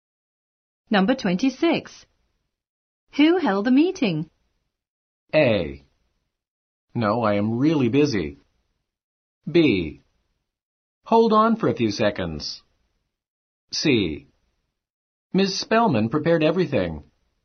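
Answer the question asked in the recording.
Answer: C: Ms. Spellman prepared everything.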